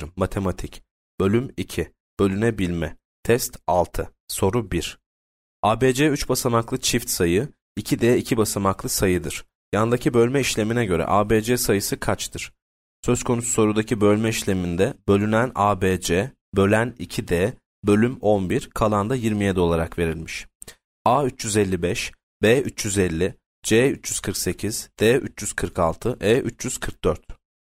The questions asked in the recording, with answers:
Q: Yandaki bölme işlemine göre ABC sayısı kaçtır?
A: Yanıt D 346.